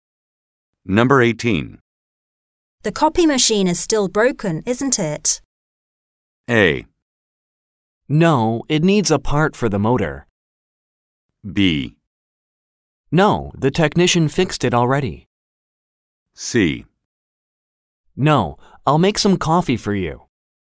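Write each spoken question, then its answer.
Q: The copy machine is still broken, isn't it?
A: B: No, the technician fixed it already.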